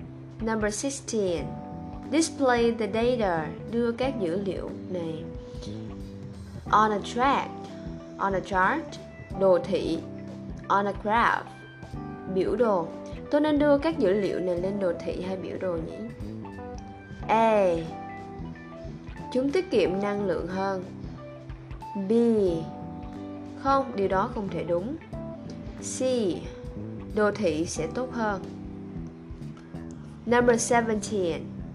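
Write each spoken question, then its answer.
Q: Tôi nên đưa các dữ liệu này lên đồ thị hay biểu đồ nhỉ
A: C: đồ thị sẽ tốt hơn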